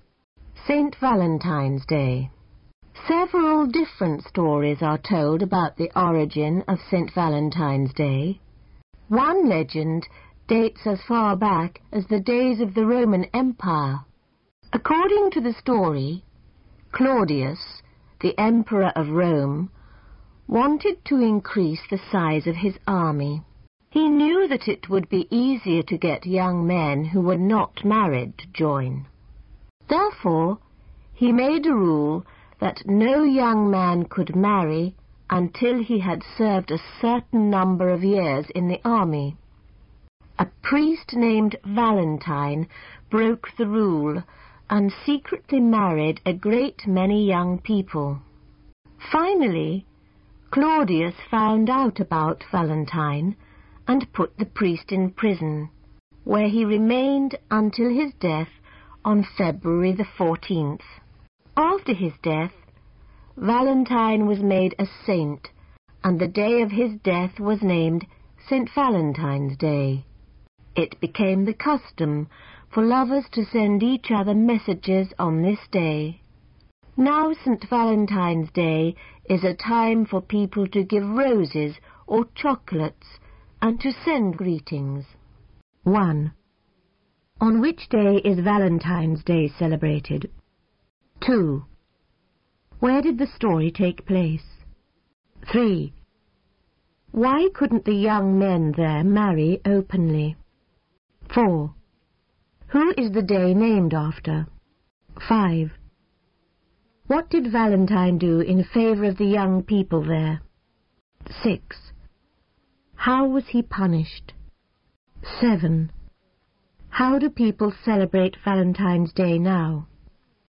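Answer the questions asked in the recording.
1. February 14th
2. In Rome (the Roman Empire)
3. The emperor ruled they must serve in the army first
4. A priest named Valentine
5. He secretly married them
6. He was put in prison until his death
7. By giving roses or chocolates and sending greetings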